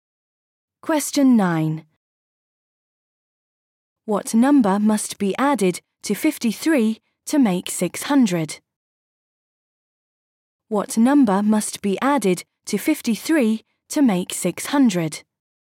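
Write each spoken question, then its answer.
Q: What number must be added to 53 to make 600?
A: 547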